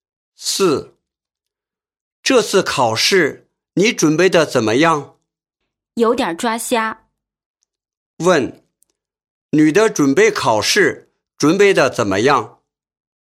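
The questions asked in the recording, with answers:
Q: 女的准备考试准备得怎么样?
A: 准备得不好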